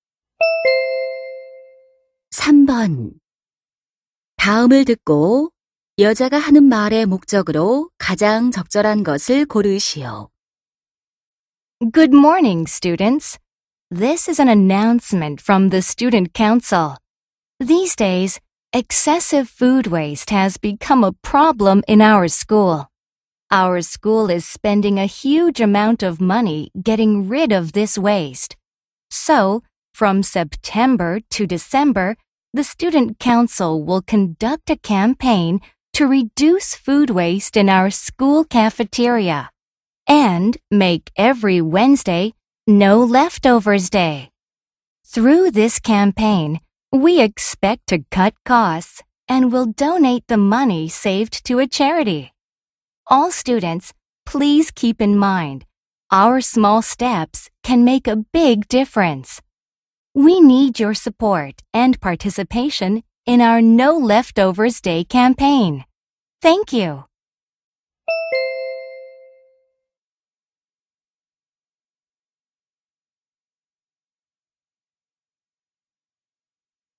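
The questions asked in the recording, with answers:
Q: 다음을 듣고 여자가 하는 말의 목적으로 가장 적절한 것을 고르시오.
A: 음식물 쓰레기 줄이기 캠페인(No Leftovers Day) 참여를 독려하려고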